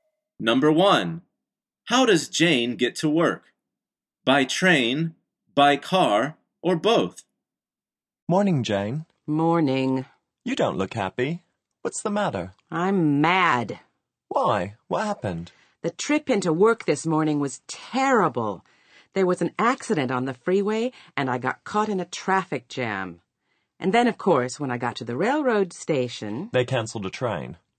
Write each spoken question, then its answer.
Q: How does Jane get to work?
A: The answer is both.